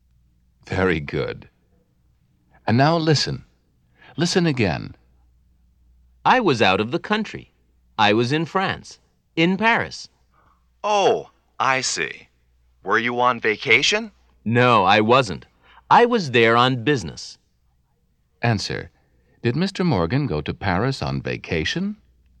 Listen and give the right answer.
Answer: No, he didn't.